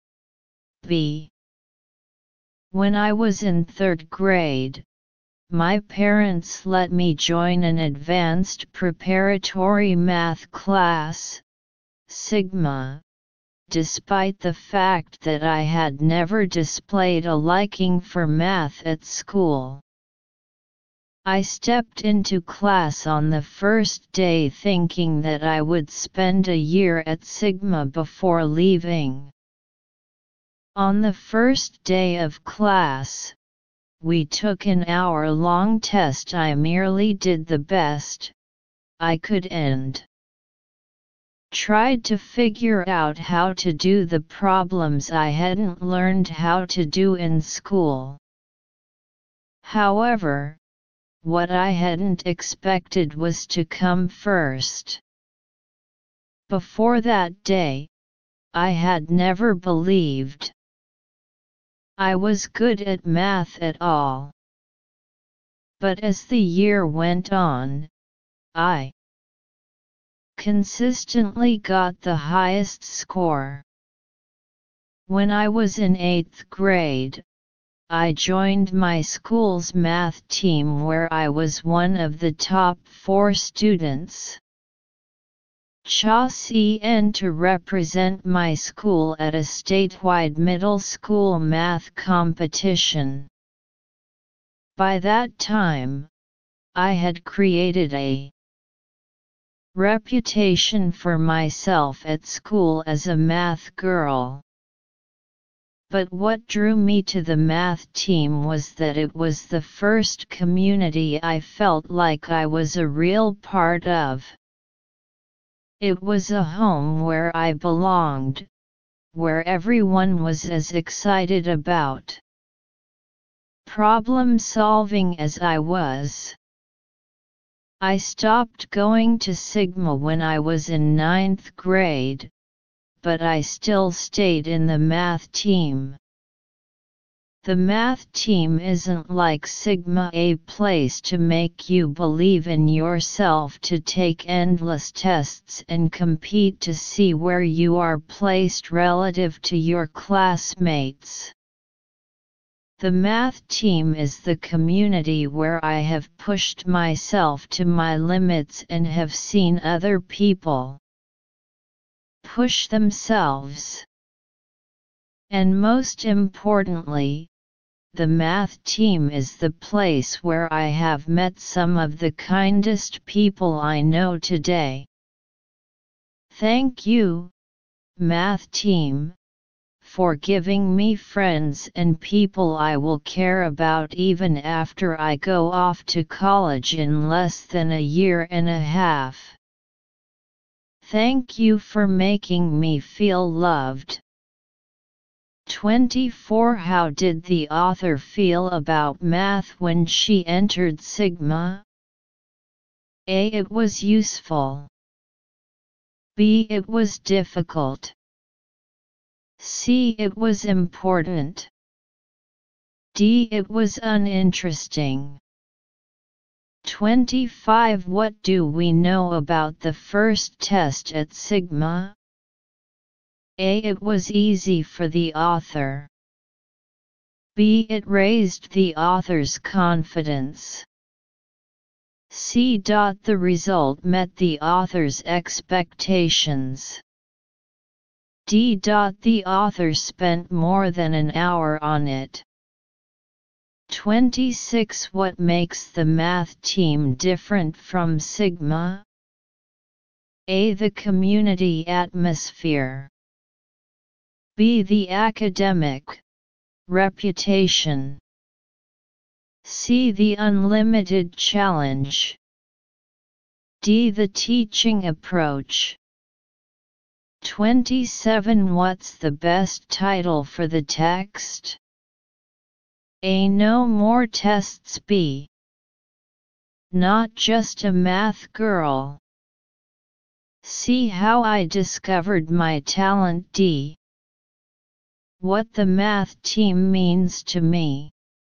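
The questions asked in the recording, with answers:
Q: How did the author feel about math when she entered Sigma?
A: D: It was uninteresting.

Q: What do we know about the first test at Sigma?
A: B: It raised the author's confidence.

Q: What makes the math team different from Sigma?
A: A: The community atmosphere.

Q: What's the best title for the text?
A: D: What the Math Team Means to Me.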